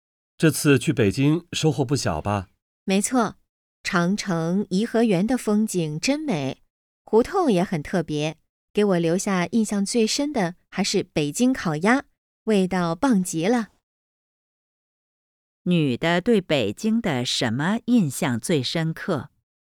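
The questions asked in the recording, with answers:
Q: 女的对北京的什么印象最深刻?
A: 北京烤鸭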